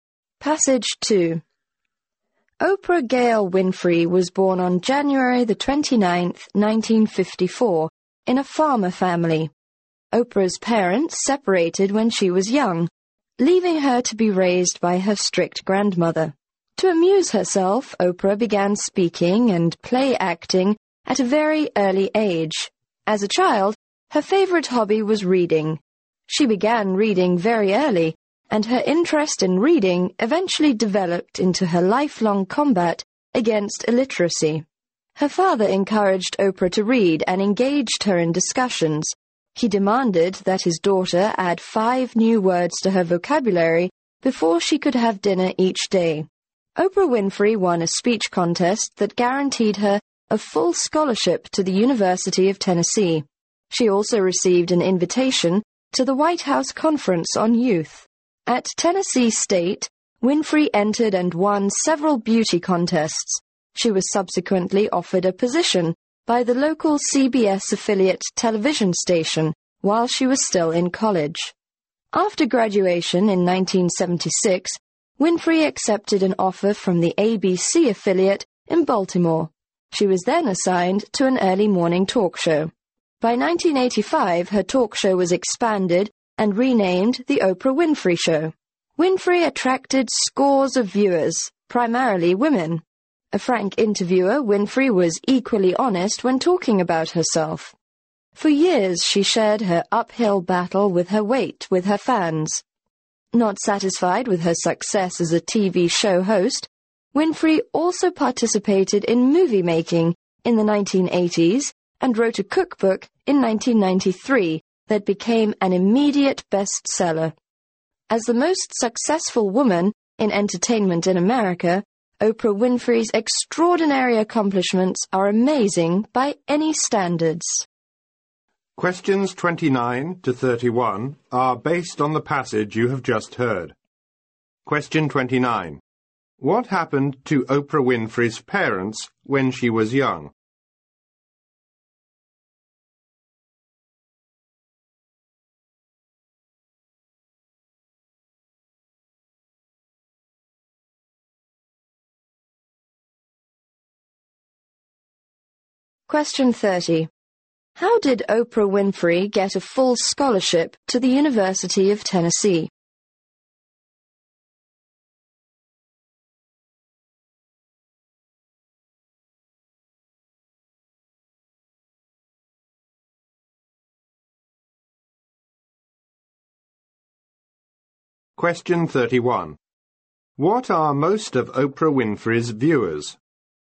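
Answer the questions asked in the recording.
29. They separated
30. She won a speech contest
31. Women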